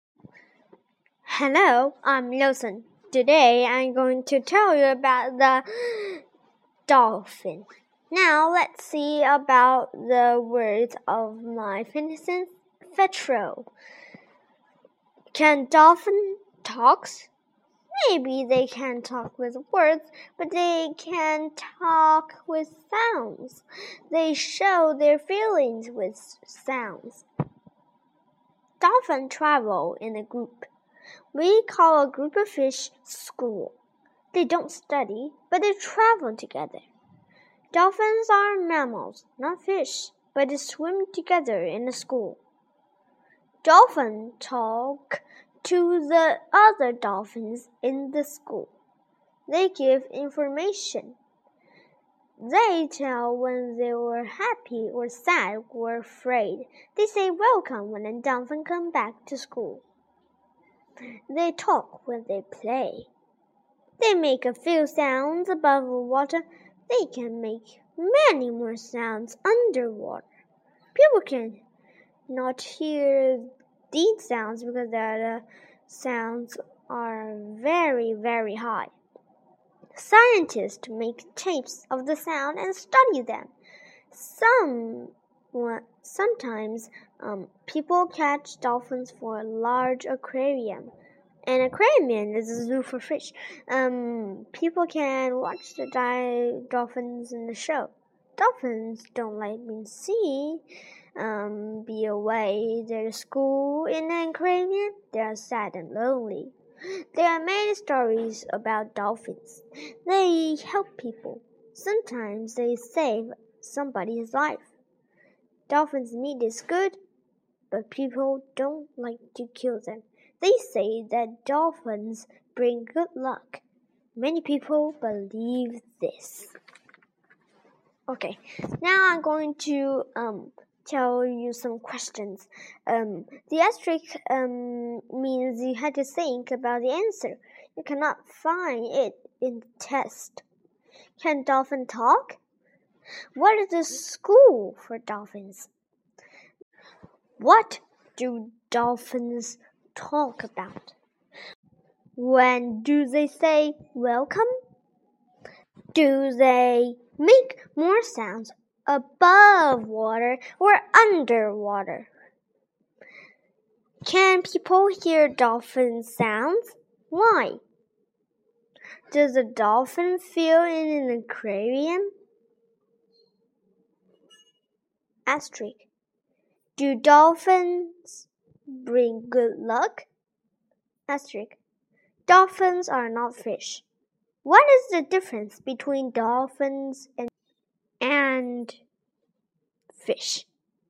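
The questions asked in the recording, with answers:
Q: Can dolphin talk?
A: Yes, they talk with sounds

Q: What is the school for dolphins?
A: A group of dolphins that travel together

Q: What do dolphins talk about?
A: They give information and tell when they are happy, sad or afraid

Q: When do they say welcome?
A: When a dolphin comes back to the school

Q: Do they make more sounds above water or underwater?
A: Underwater

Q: Can people hear dolphin sounds?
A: No, the sounds are very, very high

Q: Does a dolphin feel in an aquarium?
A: Sad and lonely

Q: What is the difference between dolphins and and fish?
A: Dolphins are mammals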